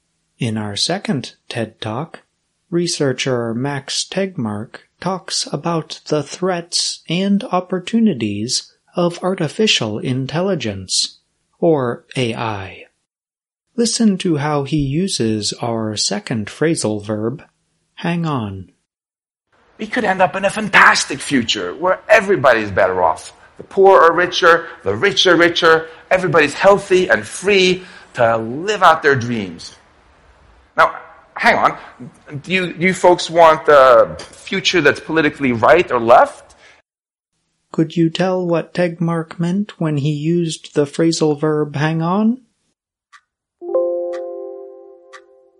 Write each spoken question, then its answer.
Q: Could you tell what Tegmark meant when he used the phrasal verb hang on?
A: hang on means wait for a short time